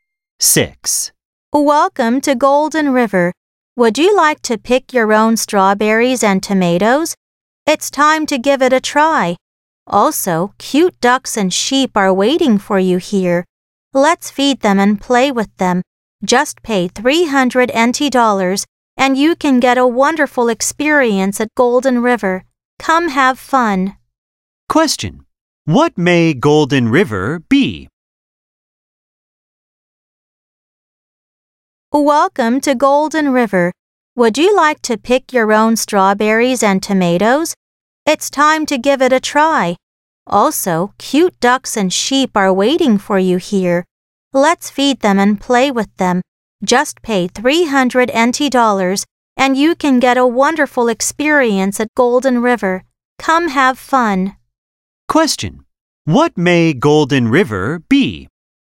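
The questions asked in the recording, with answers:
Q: What may Golden River be?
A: A farm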